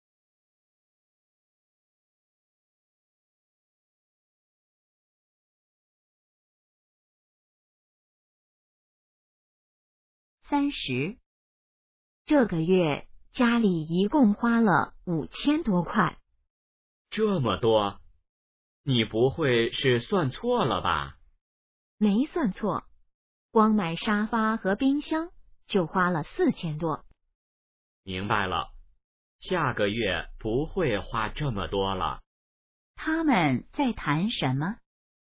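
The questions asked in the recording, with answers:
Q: 他们在谈什么?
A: 这个月家里花的钱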